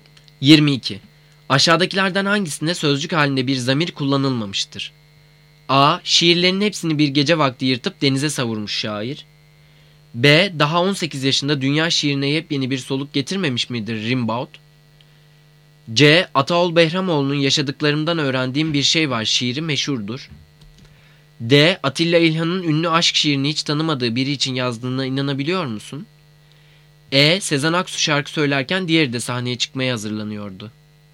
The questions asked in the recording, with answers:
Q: Aşağıdakilerden hangisinde sözcük halinde bir zamir kullanılmamıştır?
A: Cevap B. Daha 18 yaşında dünya şiirine yepyeni bir soluk getirmemiş midir Rimbaud?